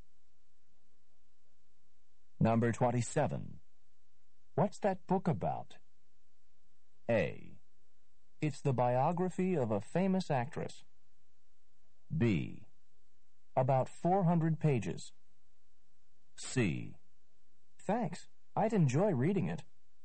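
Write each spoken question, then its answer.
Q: What's that book about?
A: A: It's the biography of a famous actress.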